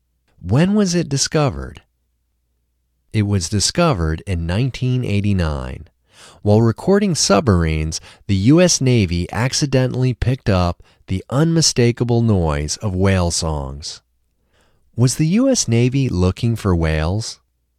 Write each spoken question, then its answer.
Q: Was the U.S. Navy looking for whales?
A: No, the U.S. Navy wasn't looking for whales.